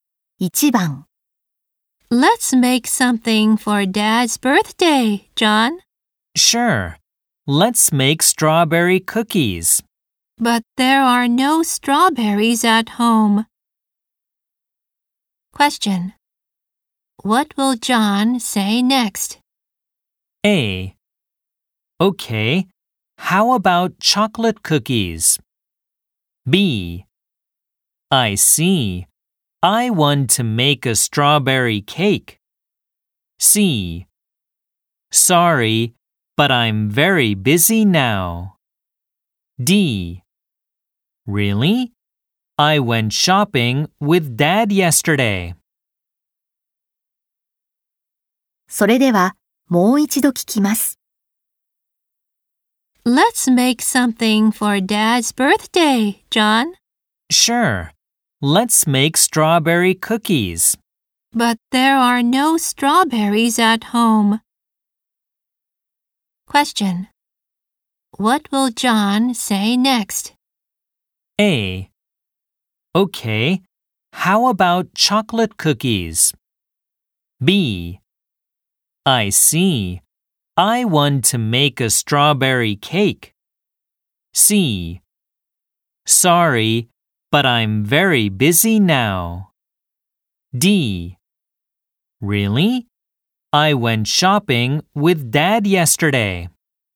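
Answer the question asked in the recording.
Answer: A: Okay, how about chocolate cookies?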